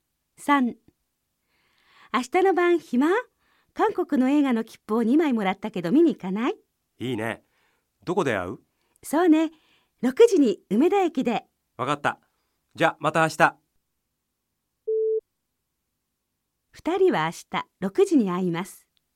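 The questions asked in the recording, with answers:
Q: 2人は明日6時に会います。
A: 正しい(はい)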